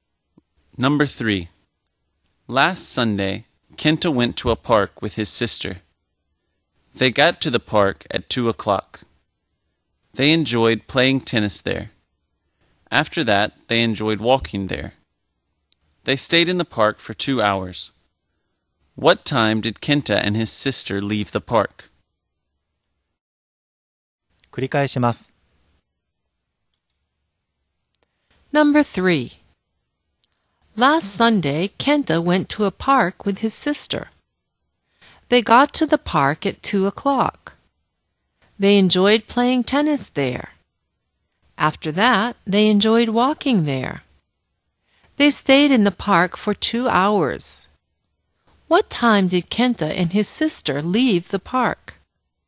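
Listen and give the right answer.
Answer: At 4 o'clock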